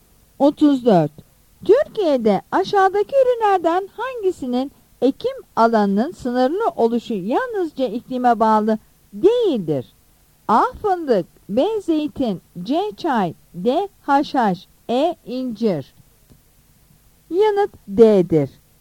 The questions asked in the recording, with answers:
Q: Türkiye'de aşağıdaki ürünlerden hangisinin ekim alanının sınırlı oluşu yalnızca iklime bağlı değildir?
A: Yanıt D'dir.